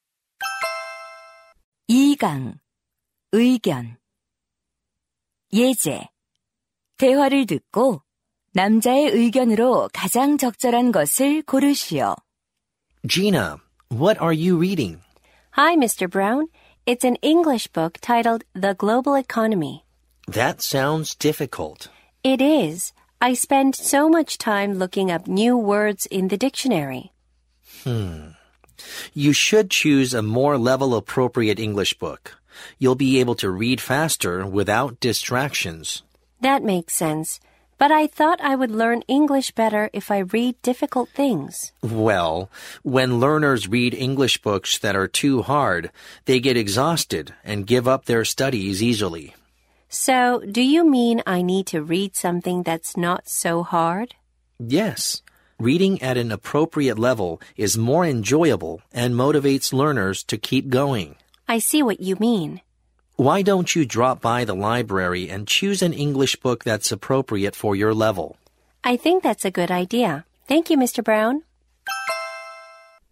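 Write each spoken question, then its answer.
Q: 대화를 듣고 남자의 의견으로 가장 적절한 것을 고르시오.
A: 자신의 수준에 맞는 영어책을 읽어야 한다.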